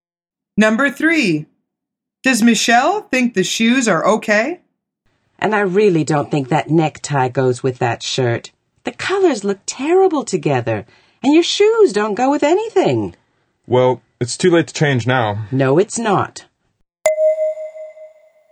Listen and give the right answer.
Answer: The answer is no.